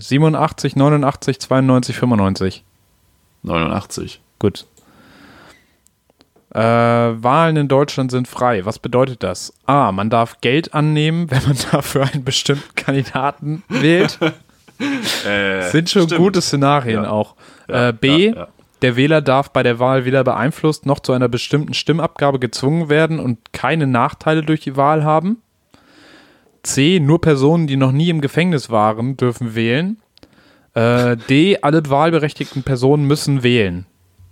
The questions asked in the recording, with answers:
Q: Was bedeutet das?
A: Ja, B.